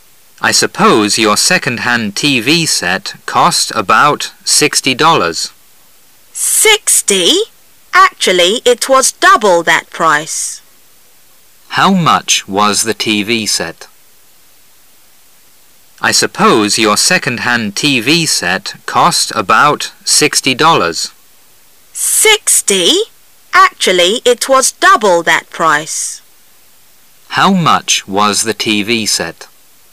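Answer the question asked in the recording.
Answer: $120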